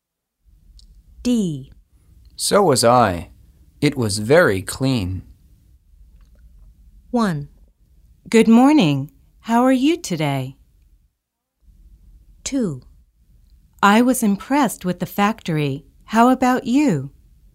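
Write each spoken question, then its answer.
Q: So was I. It was very clean.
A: 2: I was impressed with the factory. How about you?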